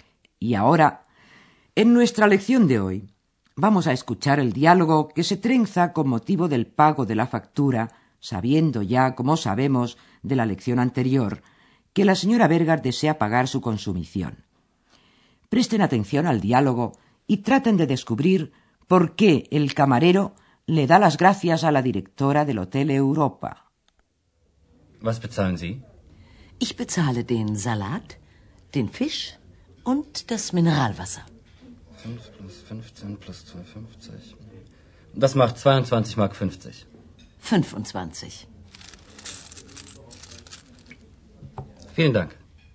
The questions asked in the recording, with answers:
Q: Presten atención al diálogo y traten de descubrir por qué el camarero le da las gracias a la directora del Hotel Europa.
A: El camarero le da las gracias a la señora Berger por la propina que ésta le deja.